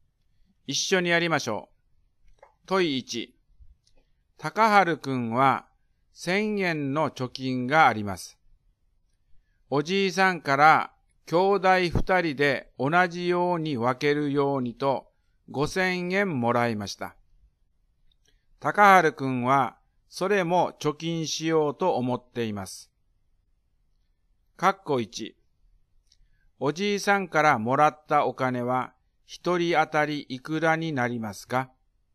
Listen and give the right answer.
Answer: 2500円になります。